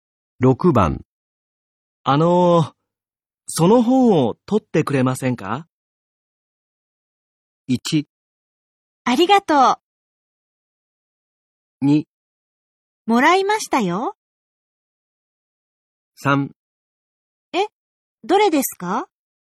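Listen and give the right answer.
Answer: 3: え、どれですか?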